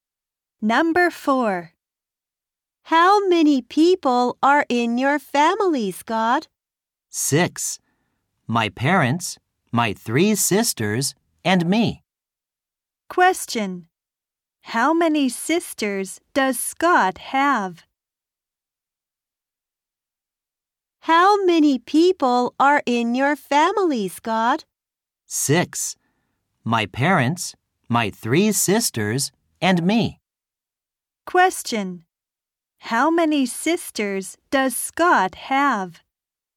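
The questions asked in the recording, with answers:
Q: How many sisters does Scott have?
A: Three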